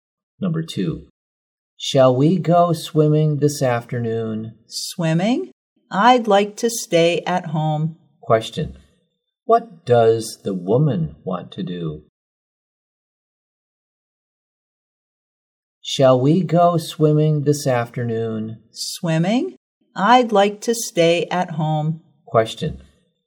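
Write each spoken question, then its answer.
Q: Question, what does the woman want to do?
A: Stay at home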